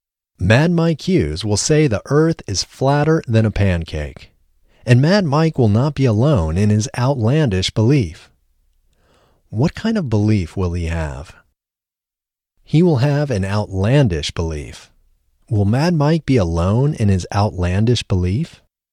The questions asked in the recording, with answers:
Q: Will Mad Mike be alone in his outlandish belief?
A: No, Mad Mike will not be alone in his outlandish belief.